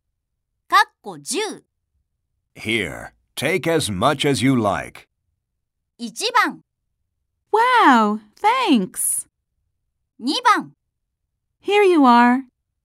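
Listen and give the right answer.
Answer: 1: Wow, thanks.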